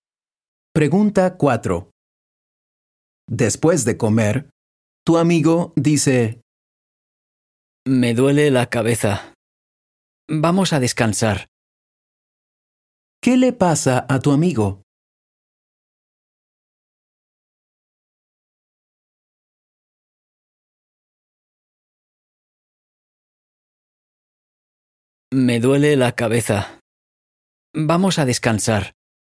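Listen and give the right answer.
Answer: Le duele la cabeza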